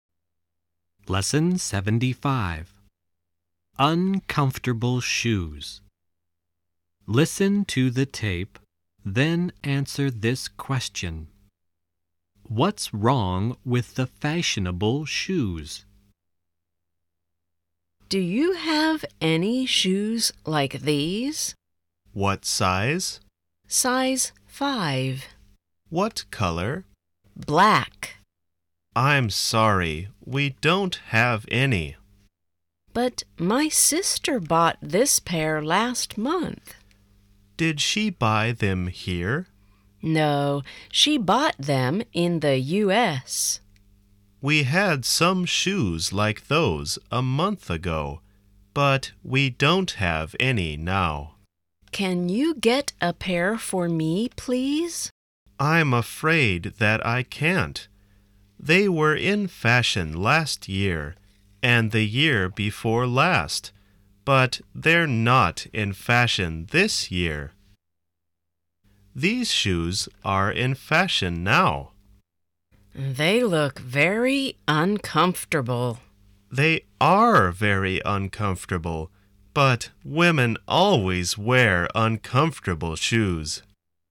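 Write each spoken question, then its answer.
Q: What's wrong with the fashionable shoes?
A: They are very uncomfortable.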